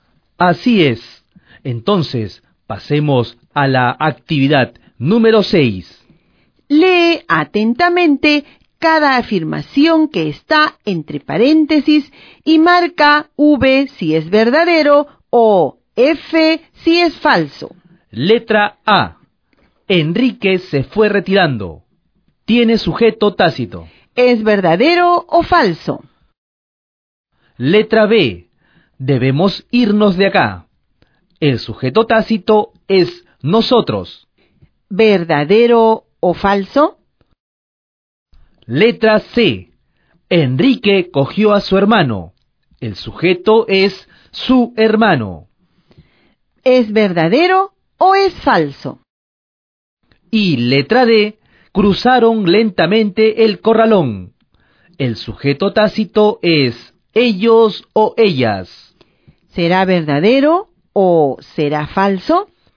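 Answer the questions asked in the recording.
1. Falso
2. Verdadero
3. Falso
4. Verdadero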